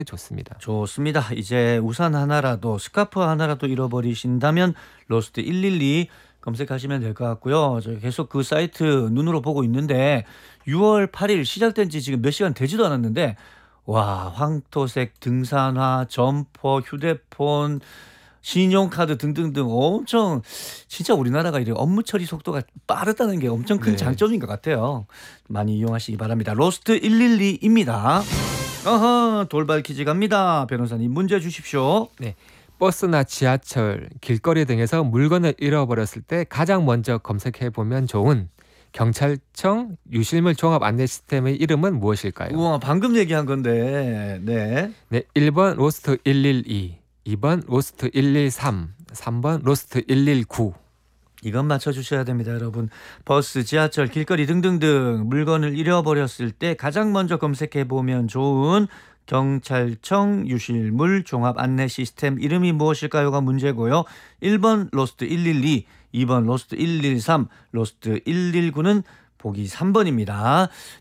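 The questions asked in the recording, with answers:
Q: 버스나 지하철, 길거리 등에서 물건을 잃어버렸을 때 가장 먼저 검색해 보면 좋은 경찰청 유실물 종합 안내 시스템의 이름은 무엇일까요?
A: 1: 로스트 112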